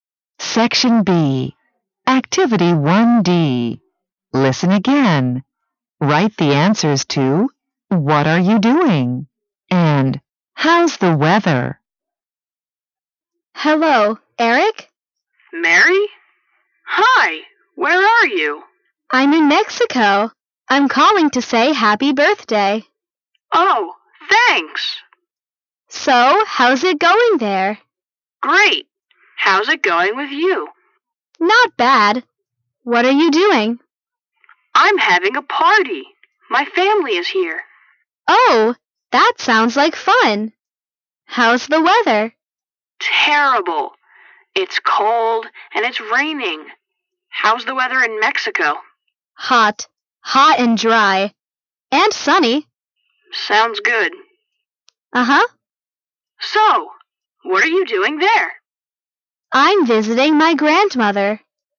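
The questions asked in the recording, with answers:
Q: What are you doing?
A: Eric: having a party with his family; Mary: visiting her grandmother in Mexico

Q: And How's the weather?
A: Eric: terrible, cold and raining; Mary (Mexico): hot, dry and sunny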